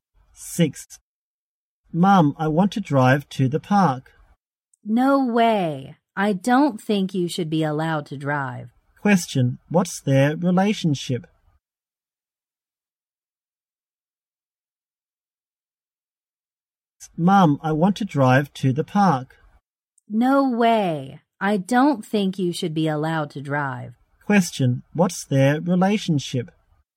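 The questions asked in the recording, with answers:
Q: Question, what's their relationship?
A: Mother and child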